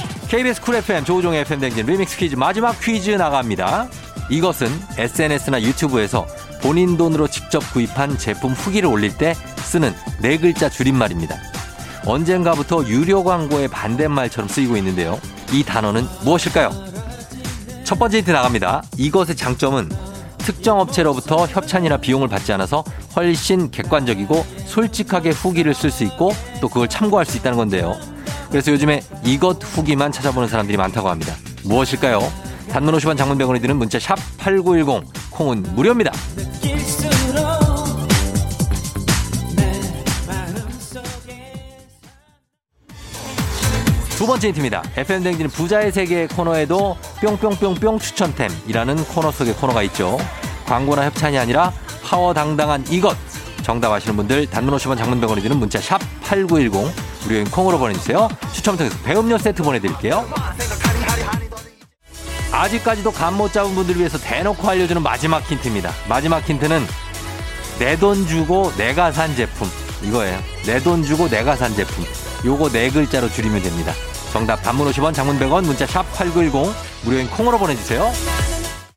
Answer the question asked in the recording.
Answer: 내 돈 두고 내가 산 내돈내산입니다.